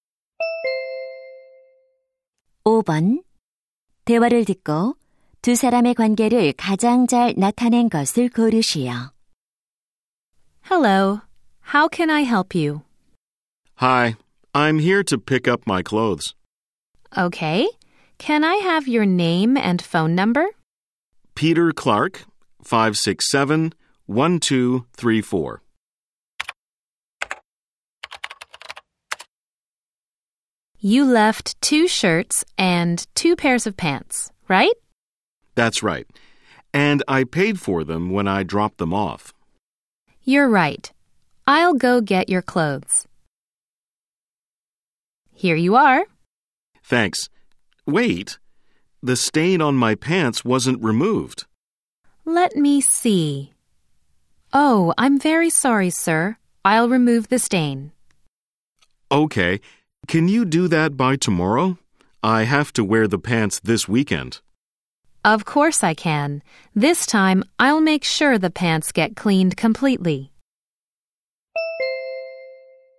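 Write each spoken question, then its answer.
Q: 대화를 듣고 두 사람의 관계를 가장 잘 나타낸 것을 고르시오.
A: 세탁소 직원과 손님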